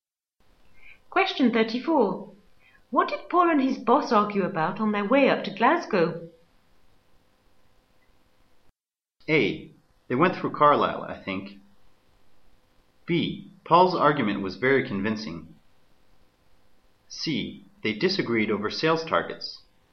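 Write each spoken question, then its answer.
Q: What did Paul and his boss argue about on their way up to Glasgow?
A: C: They disagreed over sales targets.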